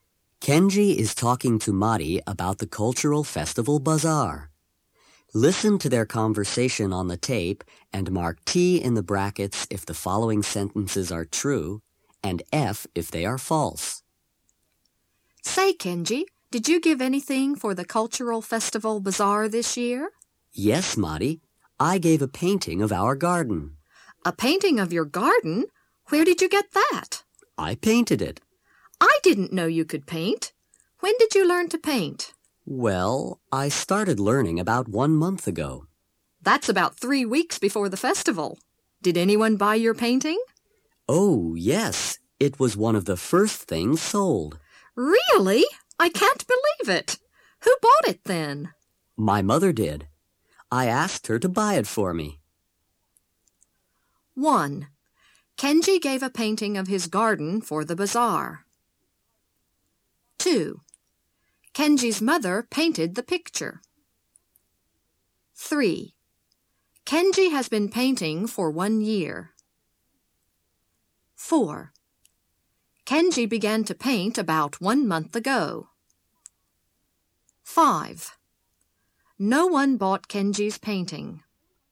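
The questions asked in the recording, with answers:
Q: Kenji gave a painting of his garden for the bazaar.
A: True

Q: Kenji's mother painted the picture.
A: False

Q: Kenji has been painting for 1 year.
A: False

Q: Kenji began to paint about 1 month ago.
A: True

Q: No one bought Kenji's painting.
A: False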